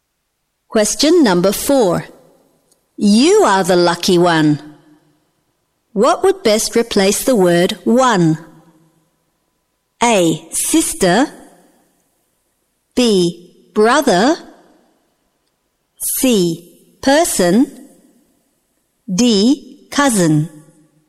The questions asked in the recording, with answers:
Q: What would best replace the word one?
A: C. Person.